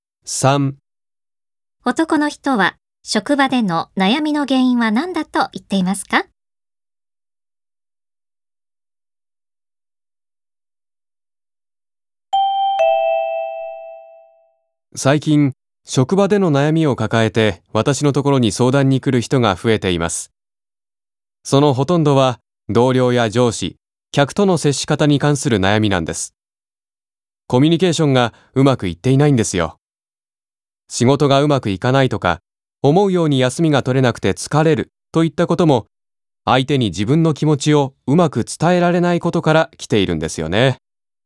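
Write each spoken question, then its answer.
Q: 男の人は職場での悩みの原因は何だと言っていますか?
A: コミュニケーションがうまくいっていないこと(相手に自分の気持ちをうまく伝えられないこと)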